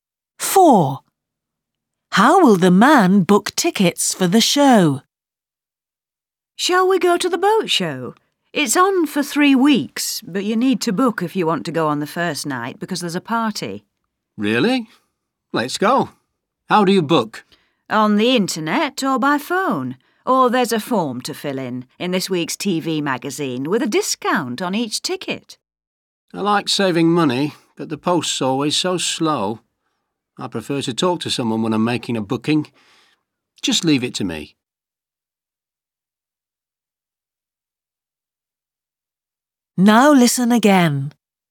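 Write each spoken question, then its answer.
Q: How will the man book tickets for the show?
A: By phone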